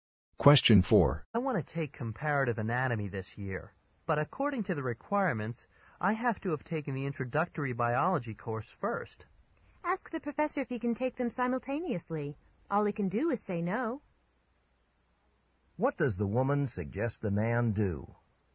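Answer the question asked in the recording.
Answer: Ask the professor if he can take both courses at the same time.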